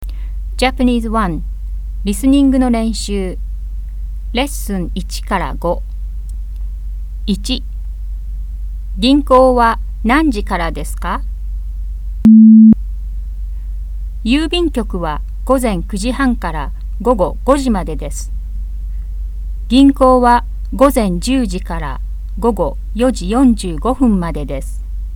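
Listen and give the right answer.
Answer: 午前10時から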